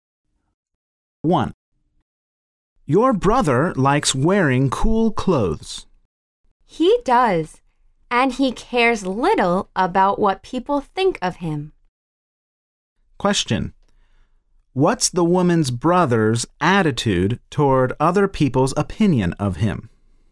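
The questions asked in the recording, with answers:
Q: What's the woman's brother's attitude toward other people's opinion of him?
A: He doesn't care much about it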